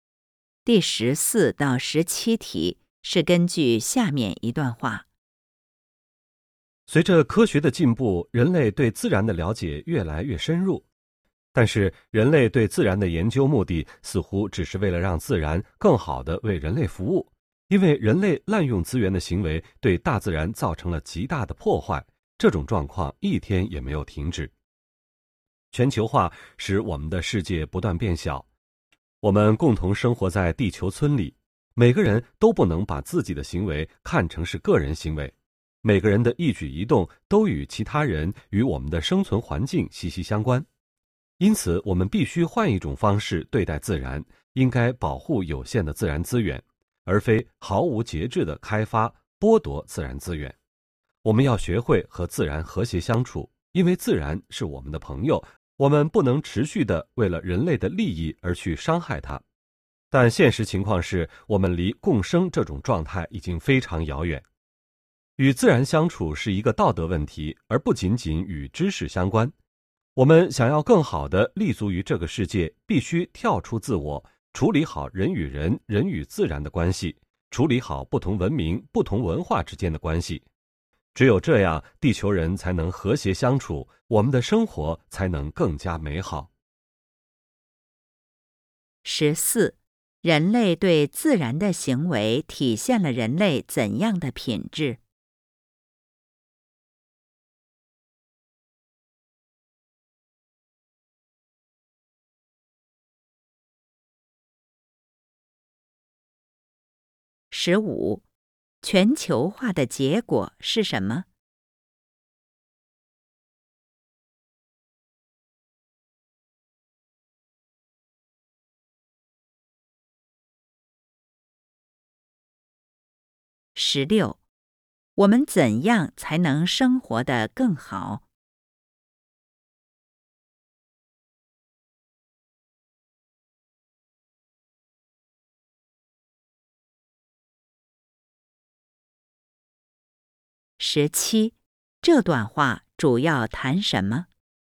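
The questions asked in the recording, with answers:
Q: 全球化的结果是什么?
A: 世界不断变小,人们共同生活在地球村里

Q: 我们怎样才能生活得更好?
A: 跳出自我,处理好人与人、人与自然以及不同文明、不同文化之间的关系

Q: 这段话主要谈什么?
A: 人类应该与自然和谐相处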